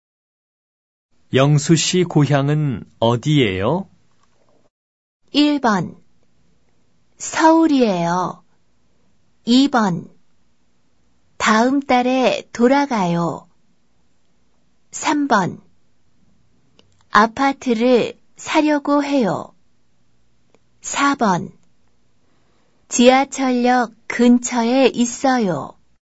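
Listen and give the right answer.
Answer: 1: 서울이에요.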